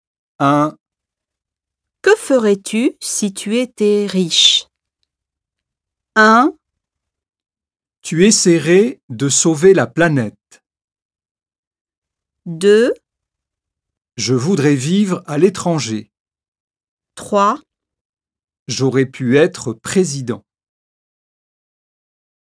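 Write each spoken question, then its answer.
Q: Que ferais-tu si tu étais riche?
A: 2: Je voudrais vivre à l'étranger.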